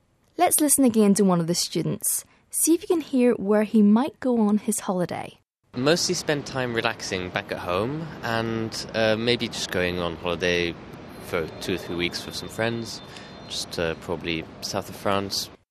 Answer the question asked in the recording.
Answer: 这位同学说,假期大部分时间他都会在家放松休闲,其余时间可能会去法国南部度假。